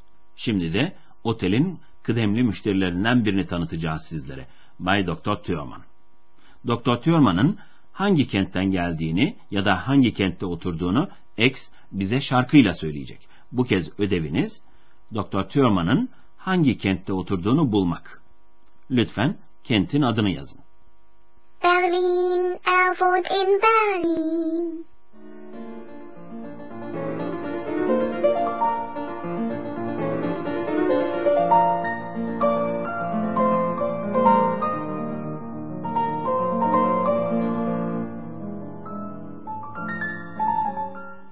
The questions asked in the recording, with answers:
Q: Bu kez ödeviniz Doktor Tüyoman'ın hangi kentte oturduğunu bulmak.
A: Burada Berlin kentinin adını seçmiş olacaksınız.